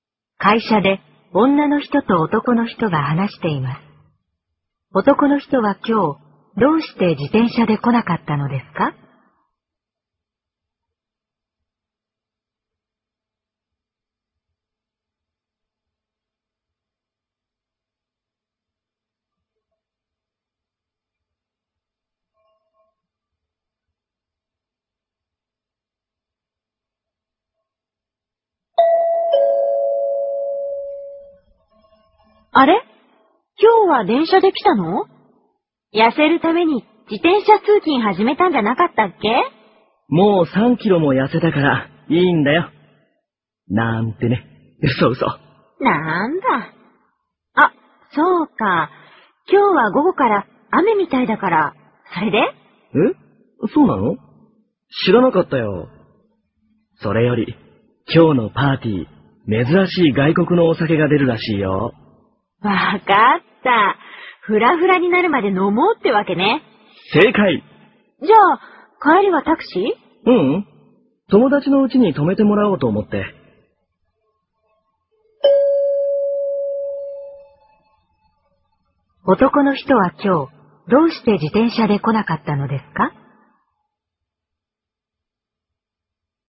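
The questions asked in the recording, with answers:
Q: 男の人は今日、どうして自転車で来なかったのですか?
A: パーティーでお酒を飲むから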